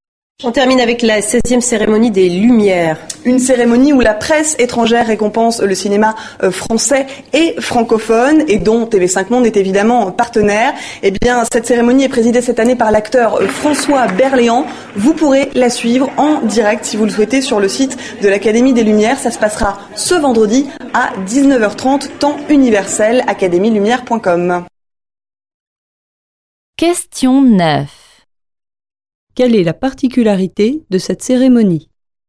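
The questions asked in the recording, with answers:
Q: Quelle est la particularité de cette cérémonie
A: C'est la presse étrangère qui récompense le cinéma français et francophone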